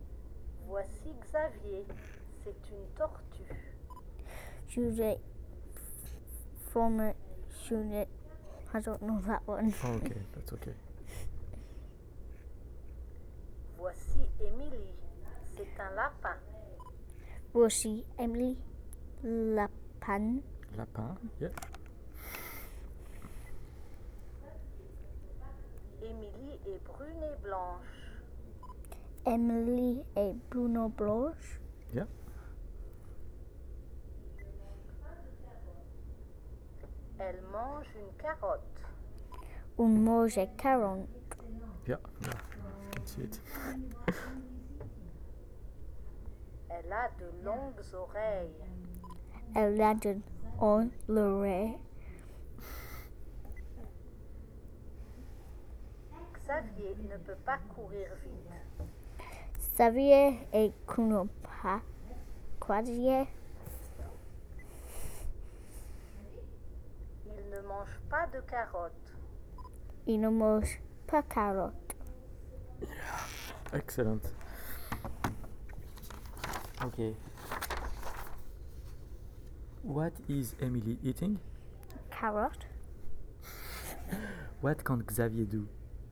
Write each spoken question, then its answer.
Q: What is Emily eating?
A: Carrot.